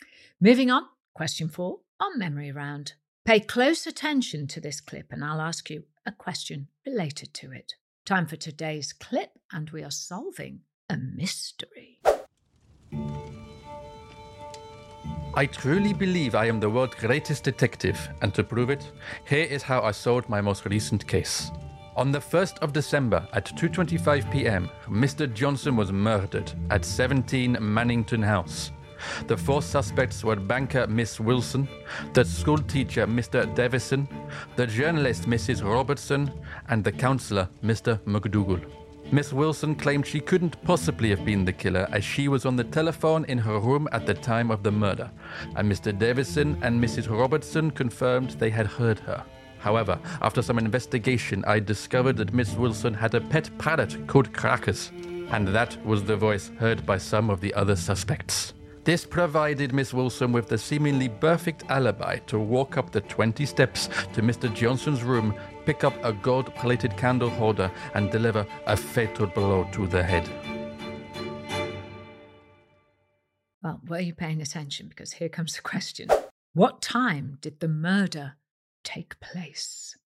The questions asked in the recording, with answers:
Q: What time did the murder take place?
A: The answer was 2:25 in the afternoon.